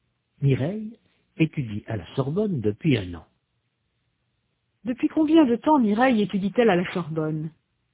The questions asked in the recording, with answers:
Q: Depuis combien de temps Mireille étudie-t-elle à la Sorbonne?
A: Depuis un an.